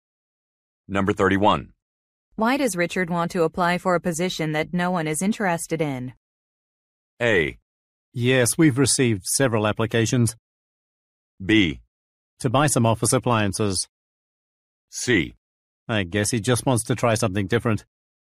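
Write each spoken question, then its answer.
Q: Why does Richard want to apply for a position that no one is interested in?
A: C: I guess he just wants to try something different.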